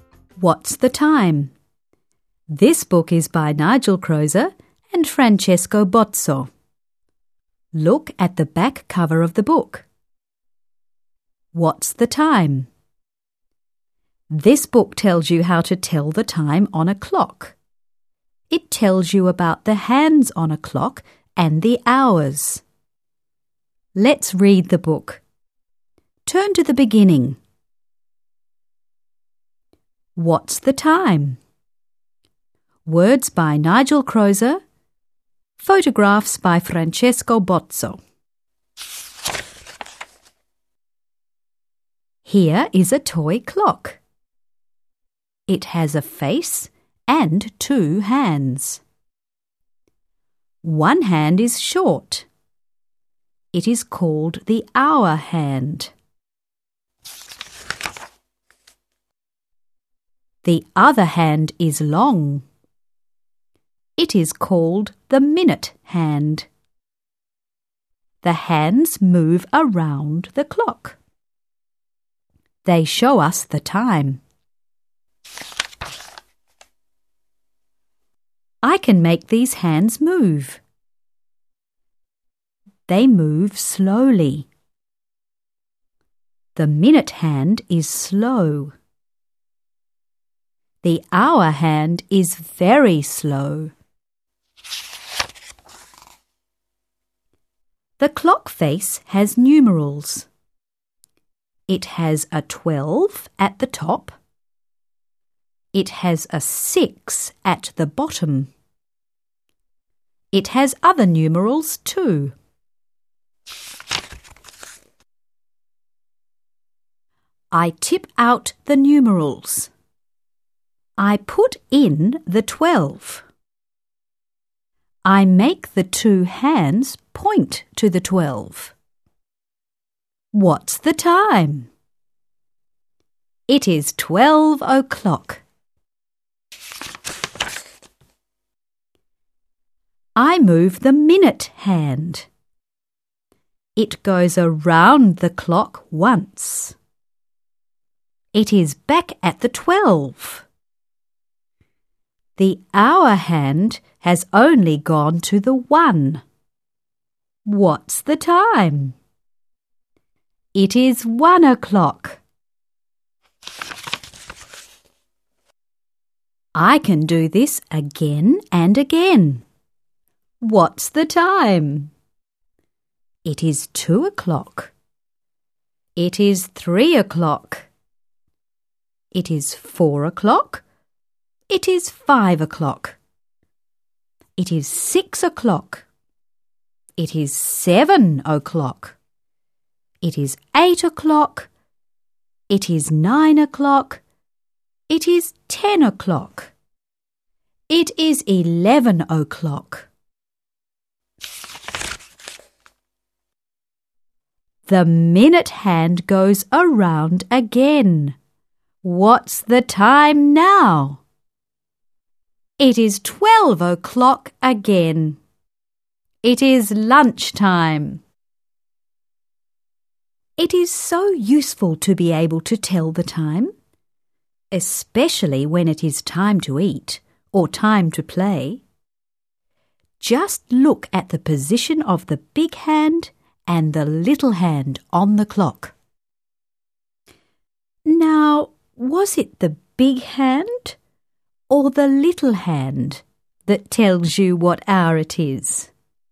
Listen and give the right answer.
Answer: One hand is short. It is called the hour hand.